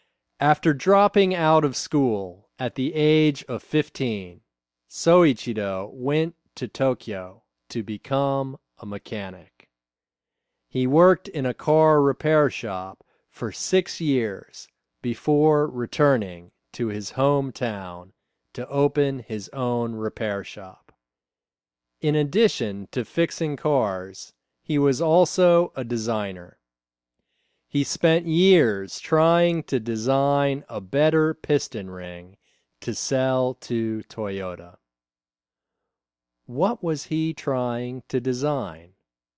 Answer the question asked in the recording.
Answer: He was trying to design a better piston ring.